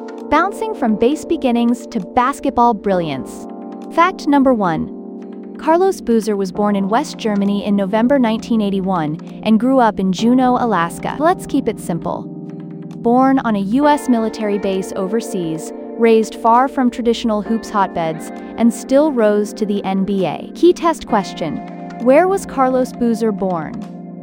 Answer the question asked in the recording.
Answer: West Germany.